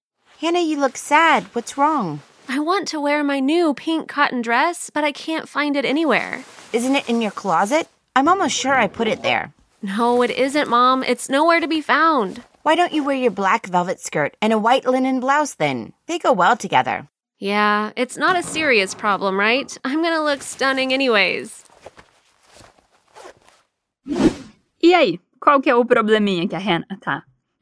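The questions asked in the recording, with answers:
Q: E aí, qual que é o probleminha que a Hannah tá?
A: Ela quer usar o vestido rosa de algodão novo, mas não consegue encontrá-lo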